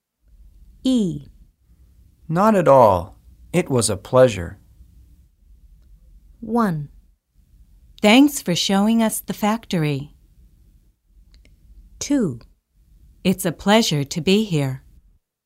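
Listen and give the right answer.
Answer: 1: Thanks for showing us the factory.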